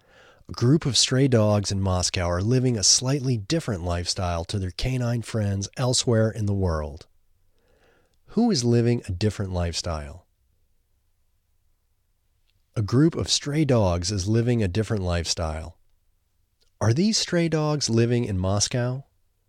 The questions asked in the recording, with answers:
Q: Are these stray dogs living in Moscow?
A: Yes, these stray dogs are living in Moscow.